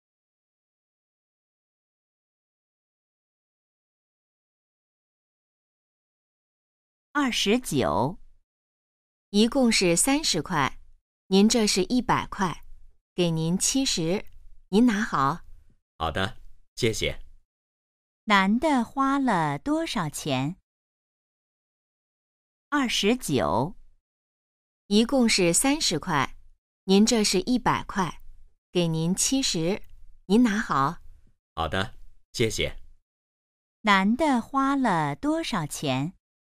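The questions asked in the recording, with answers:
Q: 男的花了多少钱?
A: 30块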